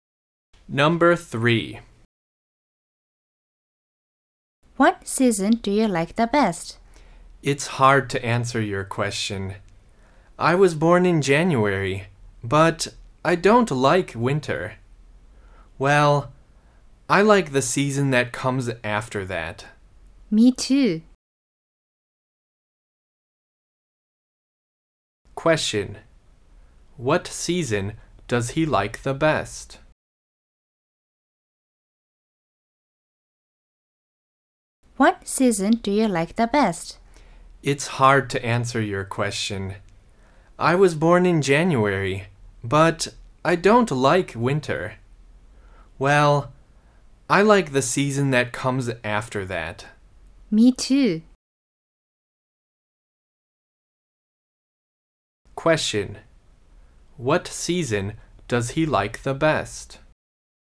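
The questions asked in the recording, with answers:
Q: What season does he like the best?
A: Spring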